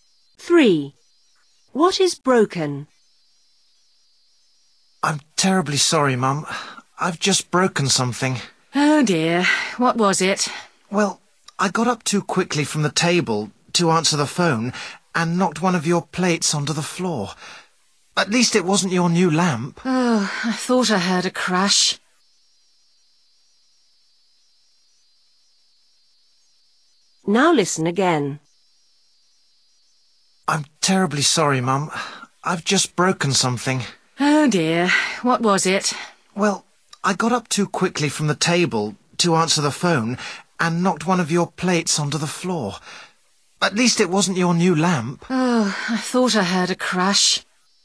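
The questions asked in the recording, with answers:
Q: What is broken?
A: A plate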